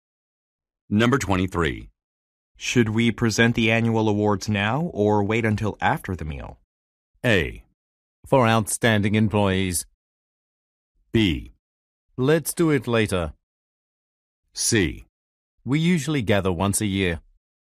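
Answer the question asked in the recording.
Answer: B: Let's do it later.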